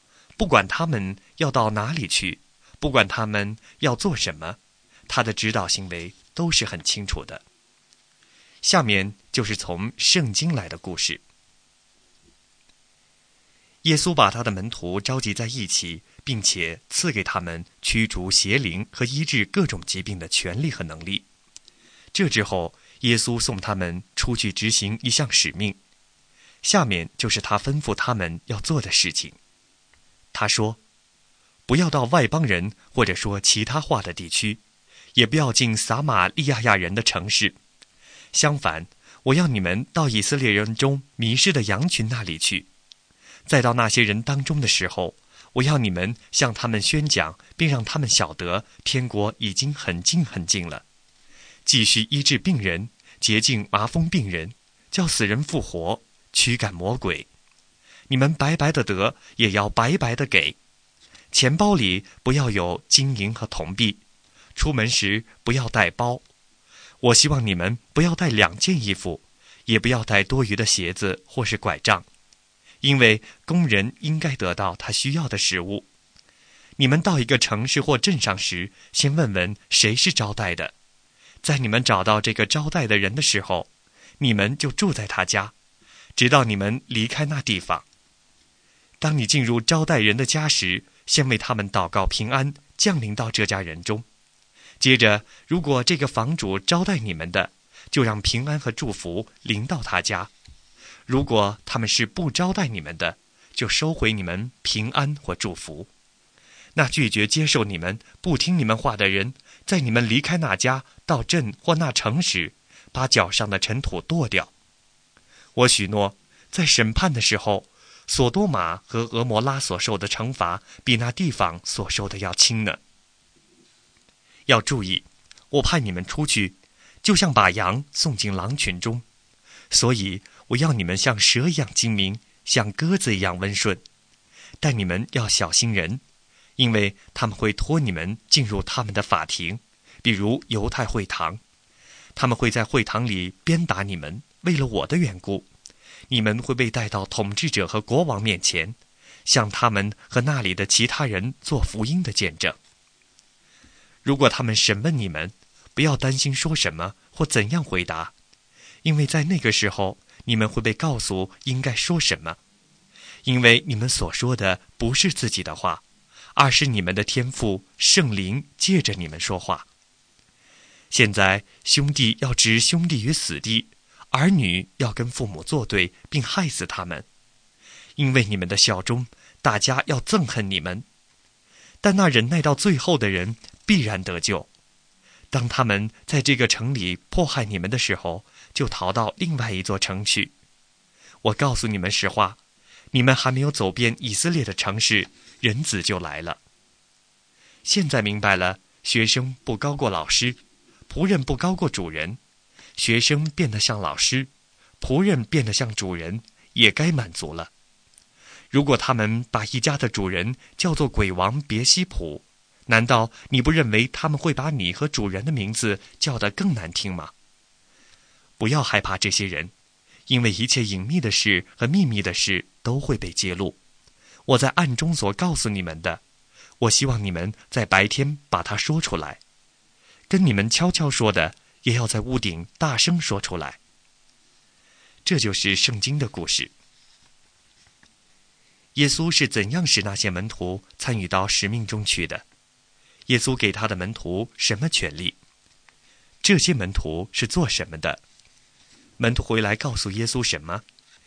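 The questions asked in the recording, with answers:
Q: 耶稣给他的门徒什么权利?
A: 驱逐邪灵和医治各种疾病的权力和能力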